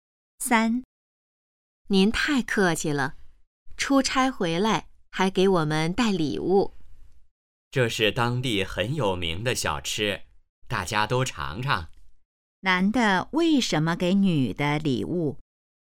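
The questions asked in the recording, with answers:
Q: 男的为什么给女的礼物?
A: 他出差回来,给大家带了当地有名的小吃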